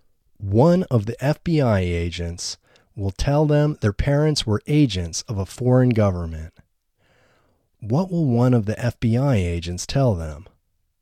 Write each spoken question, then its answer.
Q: What will one of the FBI agents tell them?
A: One of the FBI agents will tell them their parents were agents of a foreign government.